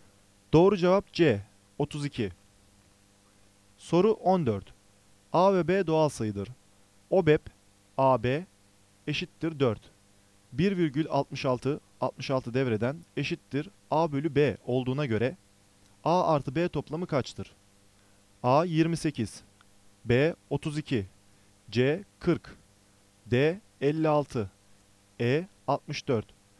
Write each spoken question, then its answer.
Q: 1,66, 66 devreden eşittir A bölü B olduğuna göre A artı B toplamı kaçtır?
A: Doğru cevap B, 32.